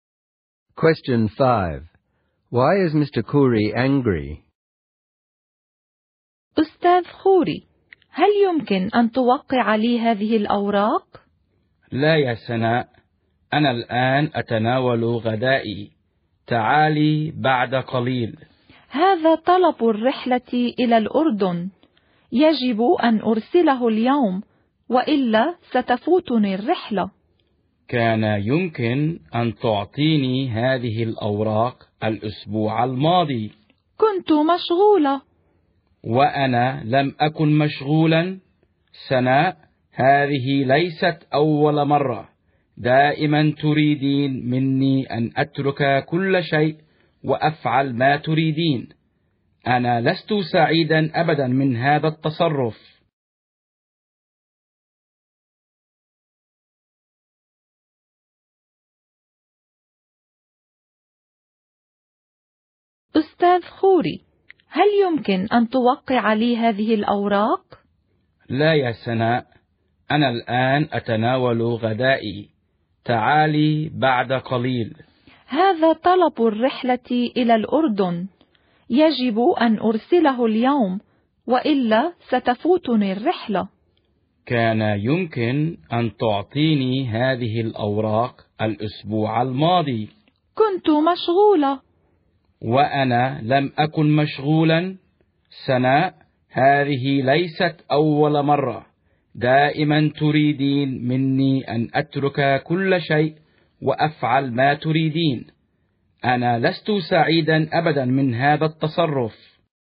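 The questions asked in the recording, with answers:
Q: Why is Mr. Khoury angry?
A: Sanaa wants him to sign her Jordan trip application during his lunch, at the last minute. She could have given it to him last week, and she often expects him to drop everything for her.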